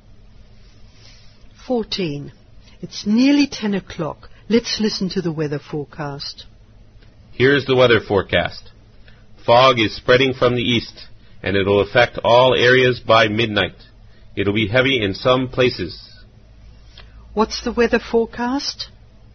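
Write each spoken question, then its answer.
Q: What's the weather forecast?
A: Heavy fog spreading from the east to all areas by midnight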